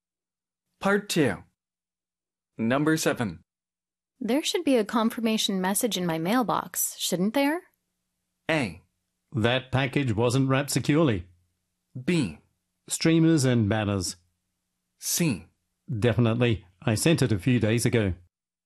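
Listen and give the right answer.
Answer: C: Definitely. I sent it a few days ago.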